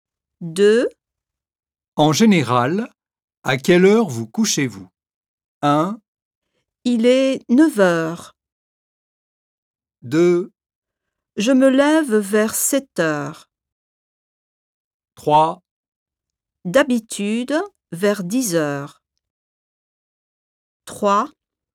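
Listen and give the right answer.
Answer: 3: D'habitude, vers 10h.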